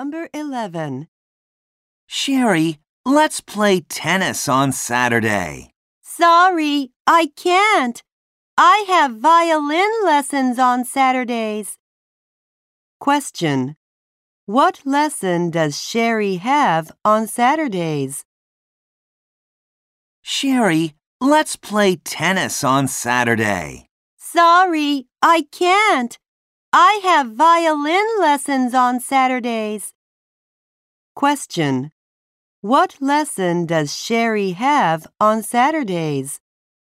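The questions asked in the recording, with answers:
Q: What lesson does Sherry have on Saturdays?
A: Violin lessons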